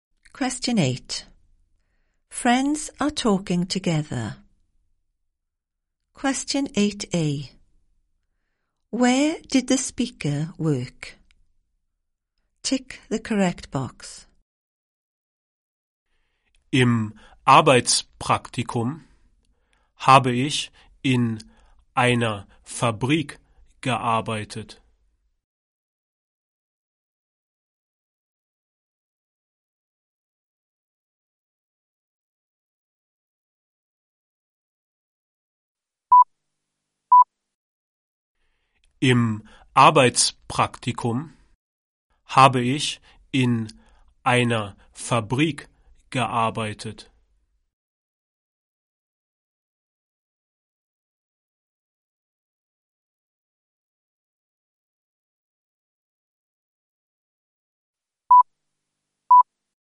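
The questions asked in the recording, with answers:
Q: Where did the speaker work?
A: In a factory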